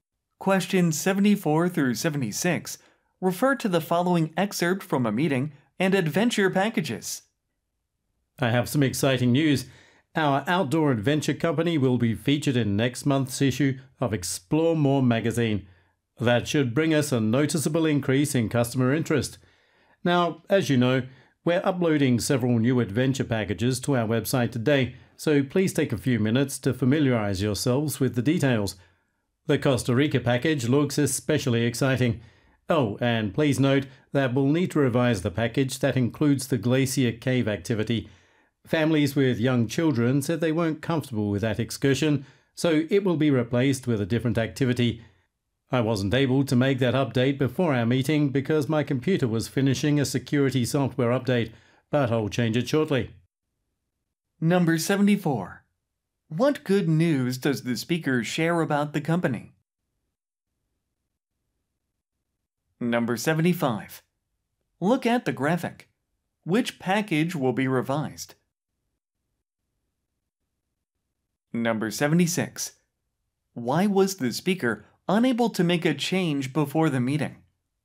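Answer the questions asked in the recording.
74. It will be featured in next month's issue of Explore More magazine
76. The speaker's computer was finishing a security software update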